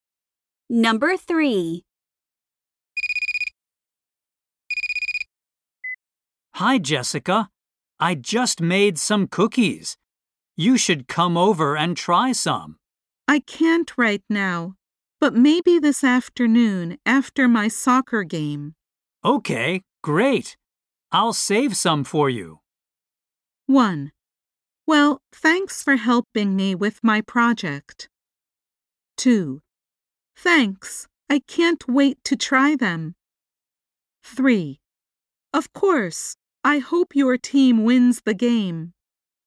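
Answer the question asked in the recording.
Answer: 2: Thanks. I can't wait to try them.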